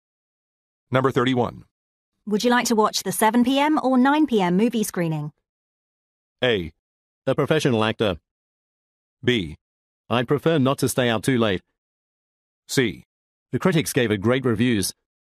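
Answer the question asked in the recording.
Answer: B: I'd prefer not to stay out too late.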